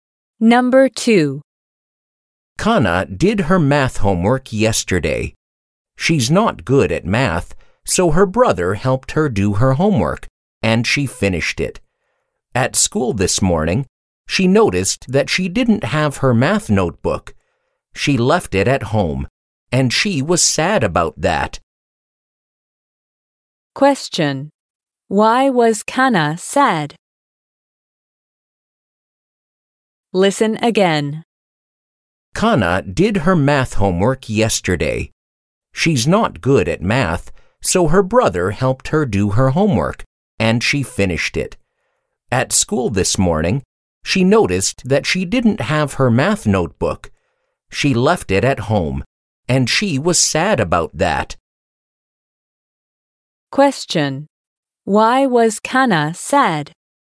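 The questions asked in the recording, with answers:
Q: Why was Kana sad?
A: She left her math notebook at home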